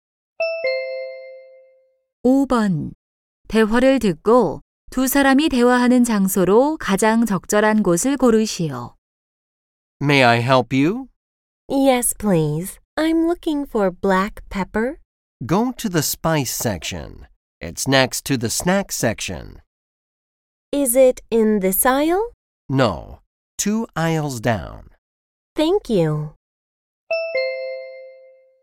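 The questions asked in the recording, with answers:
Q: 대화를 듣고 두 사람이 대화하는 장소로 가장 적절한 곳을 고르시오.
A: 식료품점(슈퍼마켓)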